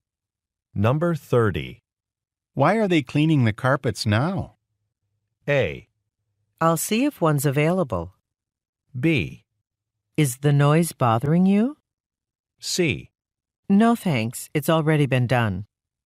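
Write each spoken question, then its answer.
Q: Why are they cleaning the carpets now?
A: B: Is the noise bothering you?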